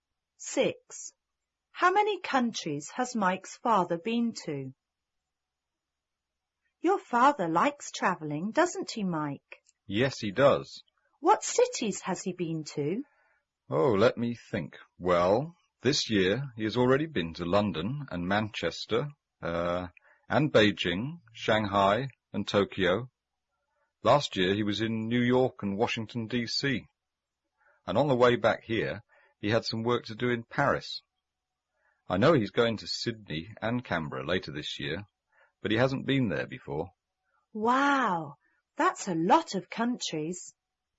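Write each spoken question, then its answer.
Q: How many countries has Mike's father been to?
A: Five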